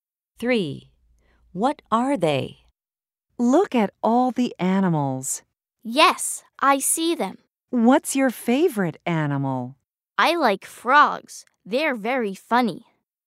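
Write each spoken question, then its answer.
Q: What are they?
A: Frogs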